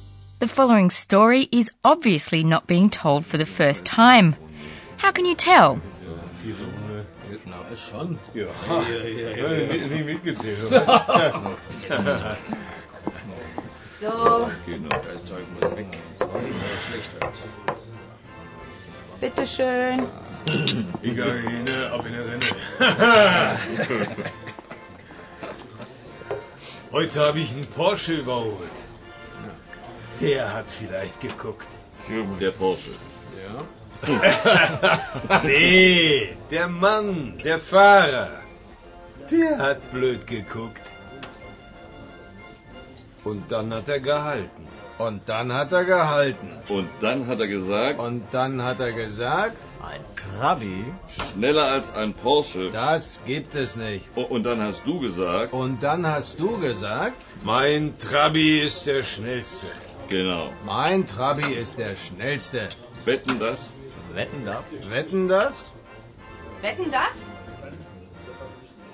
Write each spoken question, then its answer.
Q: How can you tell?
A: In two places, several men complete sentences that have already been started, in unison and very deliberately.